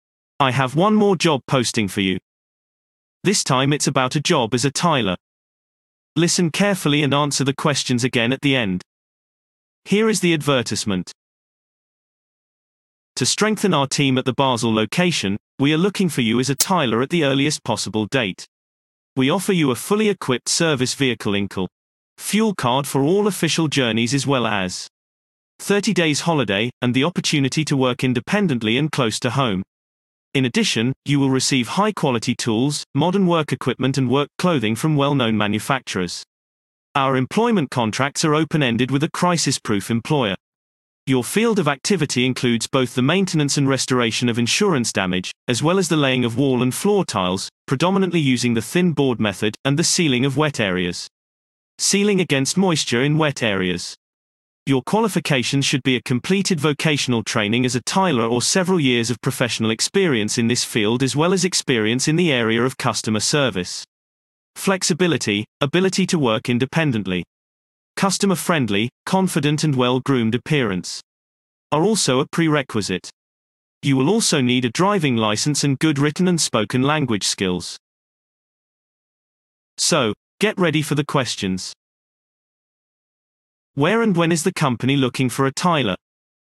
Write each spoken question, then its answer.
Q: Where and when is the company looking for a tiler?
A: Response. The company is looking for a tiler at the Basel location with immediate effect.